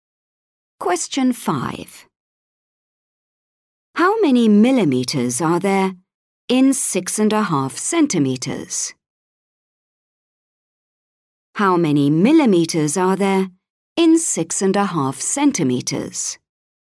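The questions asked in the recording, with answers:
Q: How many millimeters are there in 6.5 centimeters?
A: 65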